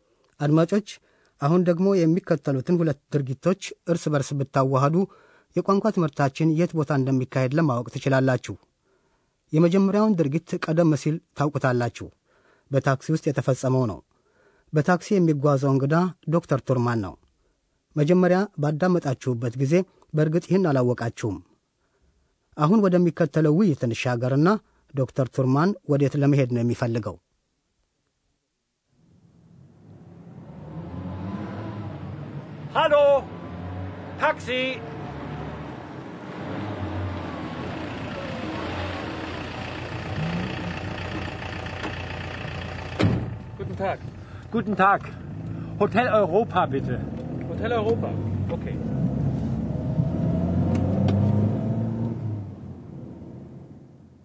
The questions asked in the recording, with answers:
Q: ዶክተር ቱርማን ወዴት ለመሄድ ነው የሚፈልገው?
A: ዶክተር ቱርማን እንግዲህ በታክሲ ወደ ሆቴል አውሮፓ ሆቴል ኦይሮፓ ለመሄድ ይፈልጋል ማለት ነው።